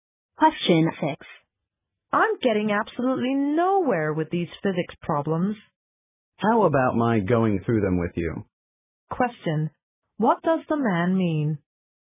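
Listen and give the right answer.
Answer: He offers to help her with the physics problems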